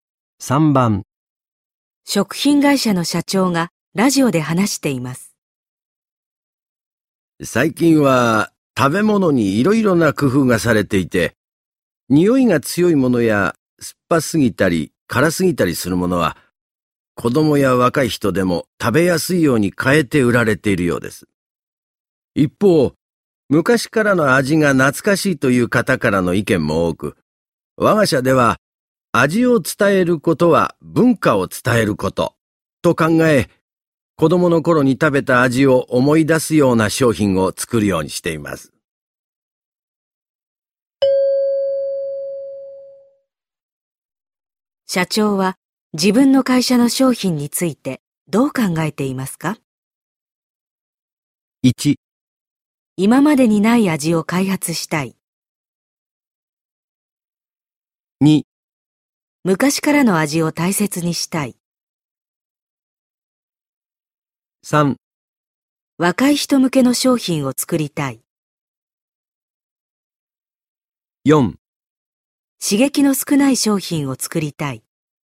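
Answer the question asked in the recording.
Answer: 2: 昔からの味を大切にしたい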